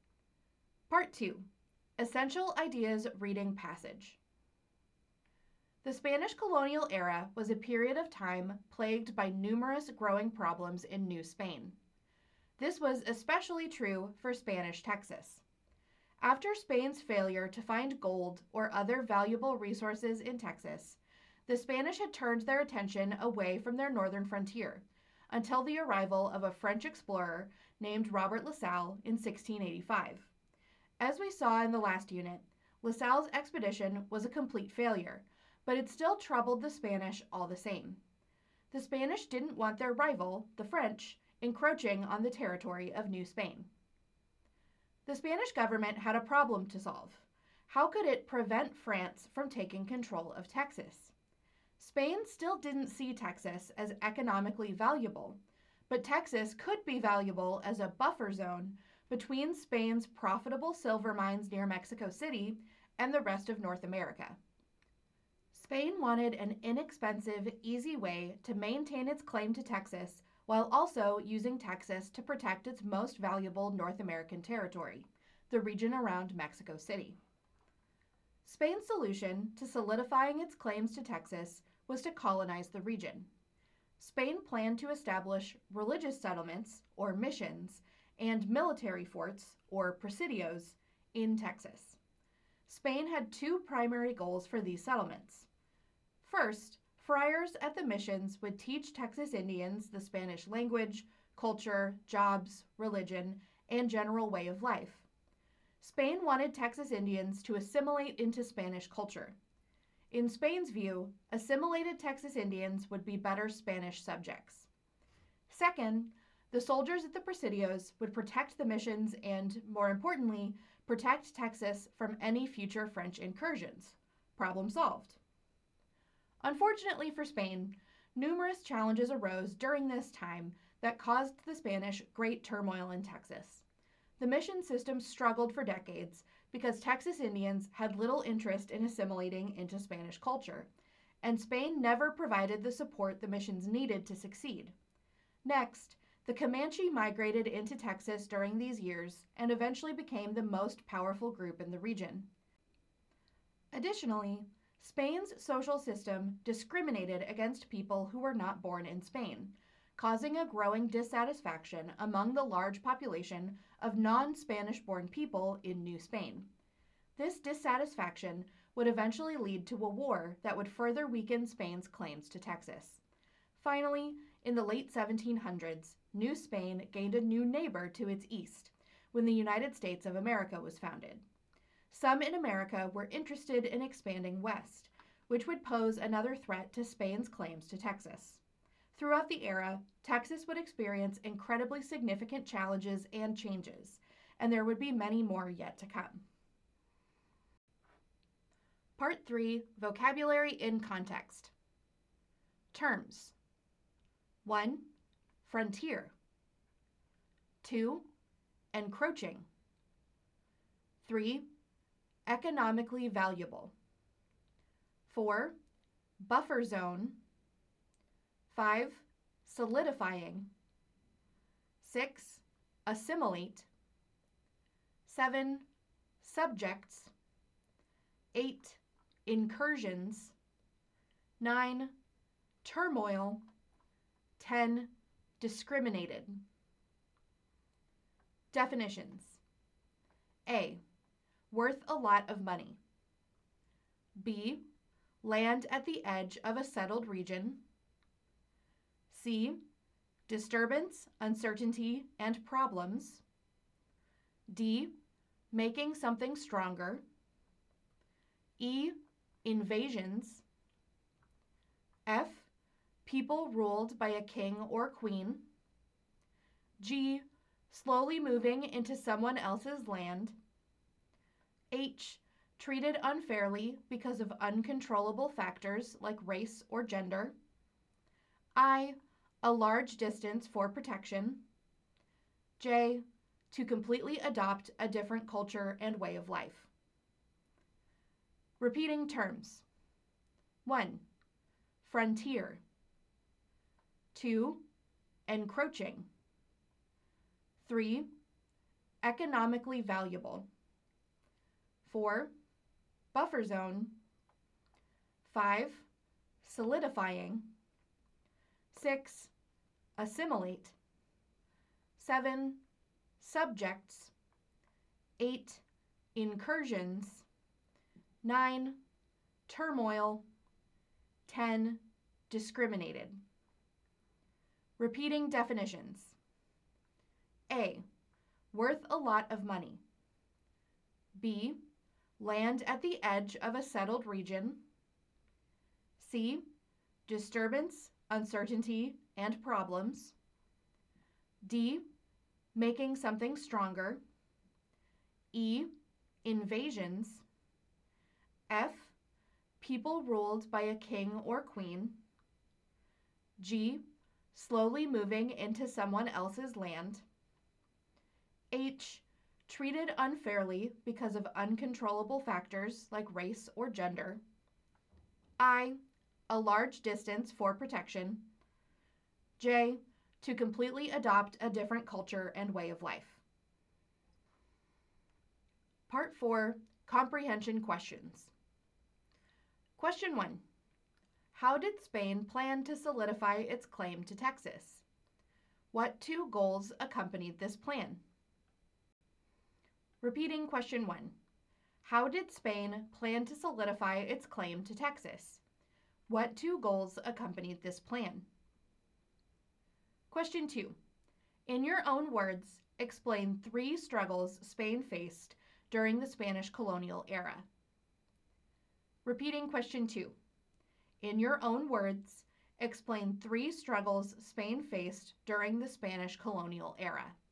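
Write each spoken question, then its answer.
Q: How did Spain plan to solidify its claim to Texas? What two goals accompanied this plan?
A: By colonizing Texas with missions and presidios; goals: friars would assimilate Texas Indians into Spanish culture, and soldiers would protect the missions and Texas from French incursions

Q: In your own words, explain three struggles Spain faced during the Spanish colonial era.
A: Struggling missions (Texas Indians uninterested, little support); the powerful Comanche migrating into Texas; discontent from a discriminatory social system leading to war; US expansion threat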